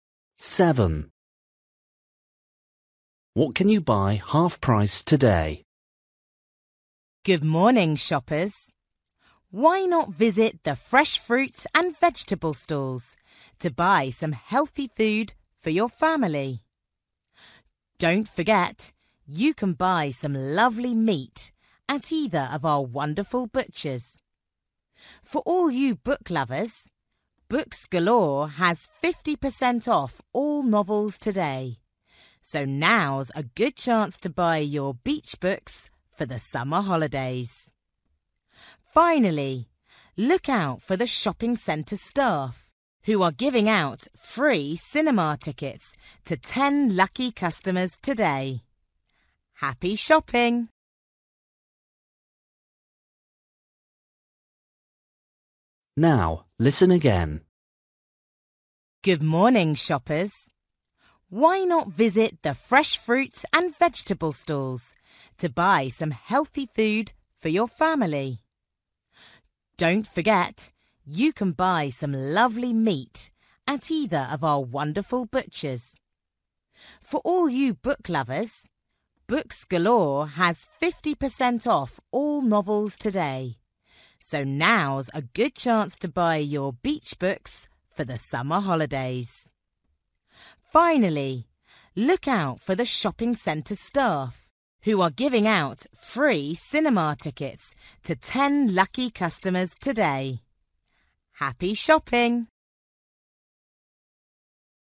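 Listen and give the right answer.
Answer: novels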